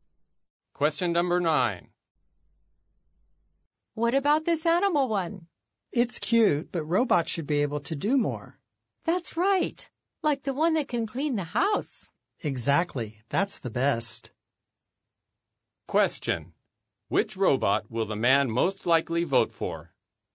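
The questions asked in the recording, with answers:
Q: Which robot will the man most likely vote for?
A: The robot that can clean the house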